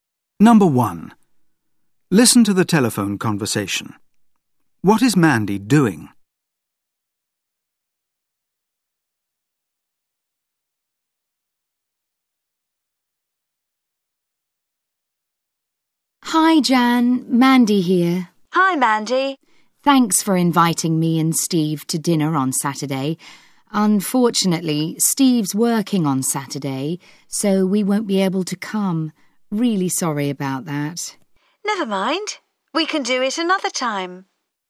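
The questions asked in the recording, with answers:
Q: What is Mandy doing?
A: Turning down Jan's dinner invitation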